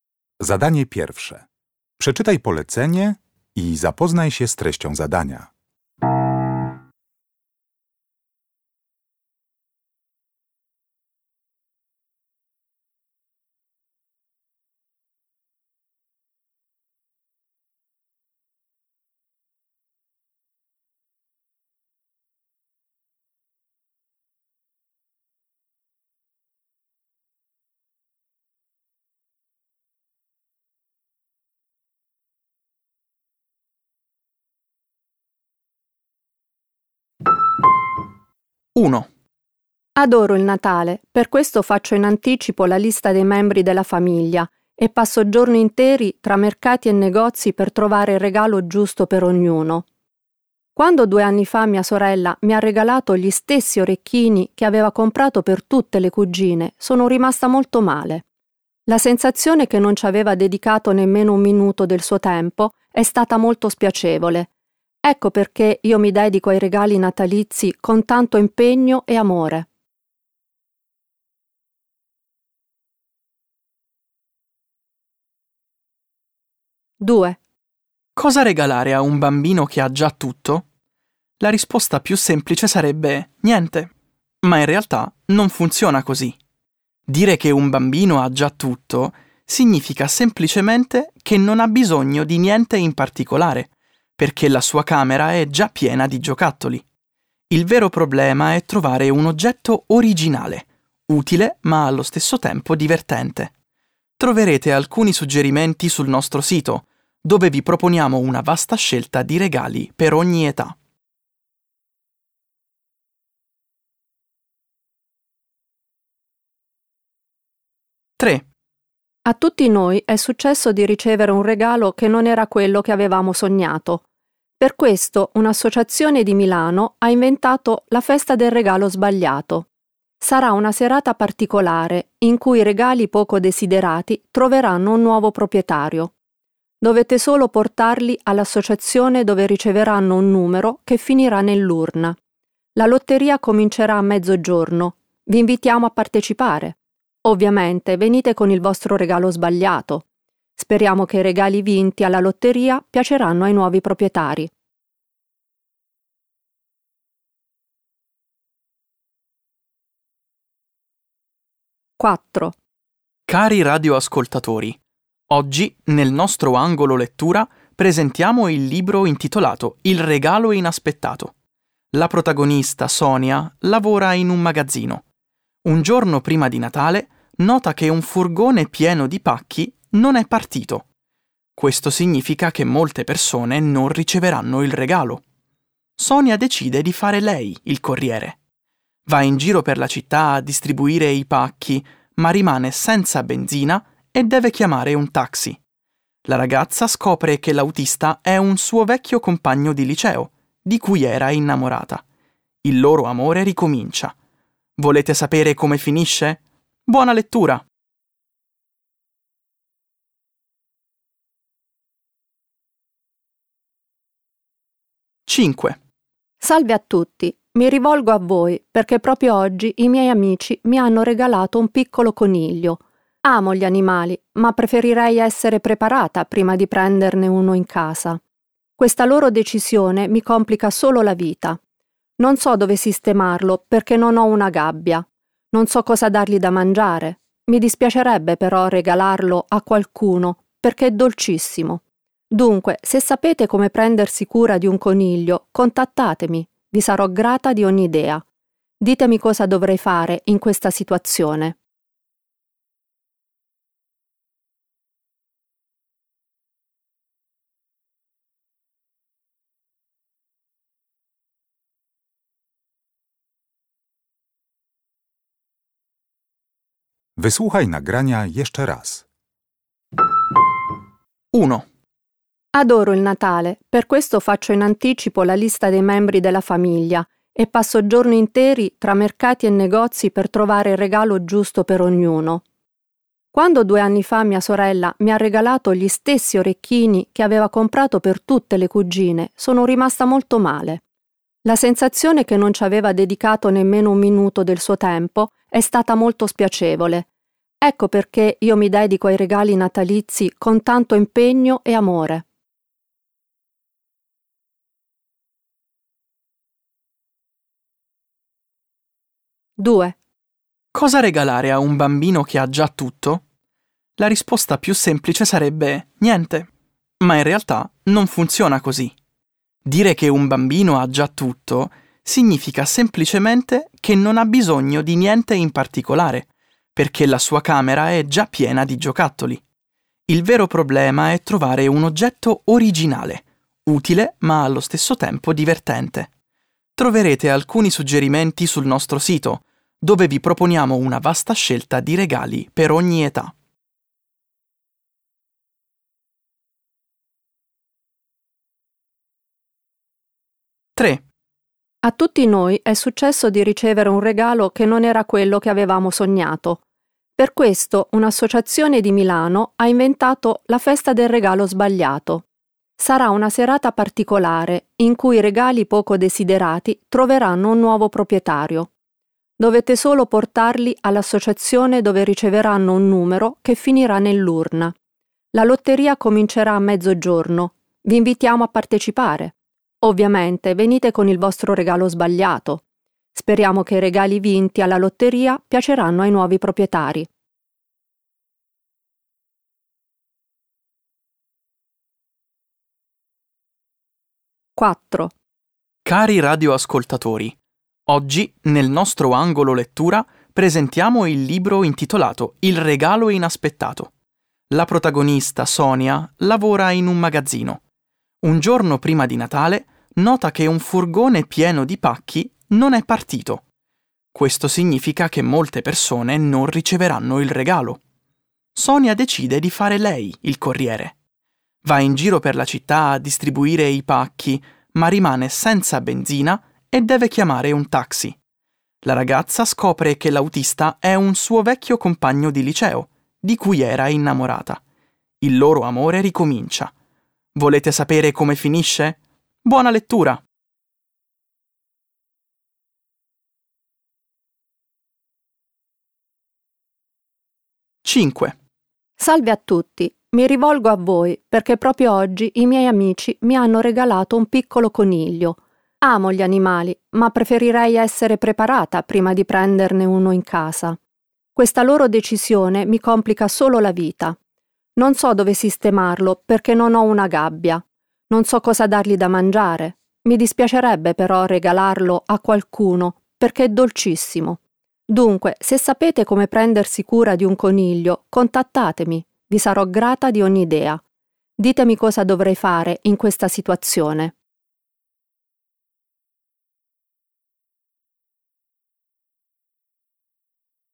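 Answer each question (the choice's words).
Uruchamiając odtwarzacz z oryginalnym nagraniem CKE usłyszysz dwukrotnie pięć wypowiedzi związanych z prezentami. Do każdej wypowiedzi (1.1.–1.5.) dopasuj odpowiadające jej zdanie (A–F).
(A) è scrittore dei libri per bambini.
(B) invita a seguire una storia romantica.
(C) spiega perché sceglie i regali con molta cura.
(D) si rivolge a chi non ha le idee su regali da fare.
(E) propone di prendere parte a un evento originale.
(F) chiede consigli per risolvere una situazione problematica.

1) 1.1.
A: spiega perché sceglie i regali con molta cura.

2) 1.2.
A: si rivolge a chi non ha le idee su regali da fare.

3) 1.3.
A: propone di prendere parte a un evento originale.

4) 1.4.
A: invita a seguire una storia romantica.

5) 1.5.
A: chiede consigli per risolvere una situazione problematica.

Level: Poziom: podstawowy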